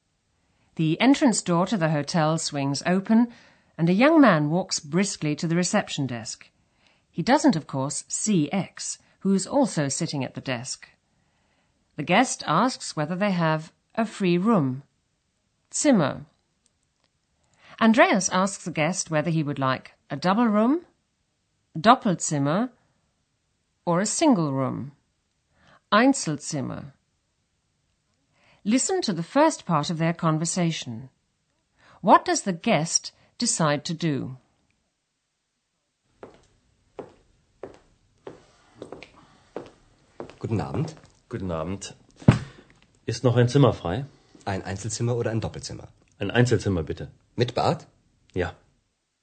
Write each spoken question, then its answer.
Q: What does the guest decide to do?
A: the guest decides to take a single room with bath, mit Bad.